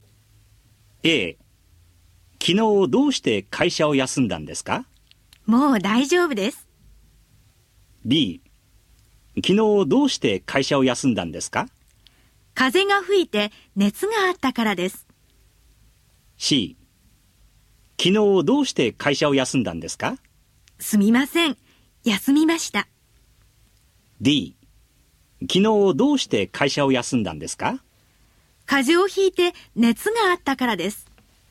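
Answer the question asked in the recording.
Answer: D: 風邪をひいて熱があったからです。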